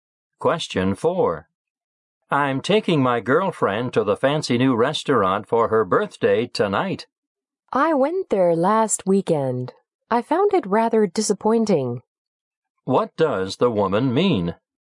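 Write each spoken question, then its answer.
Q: What does the woman mean?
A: She was disappointed with the restaurant.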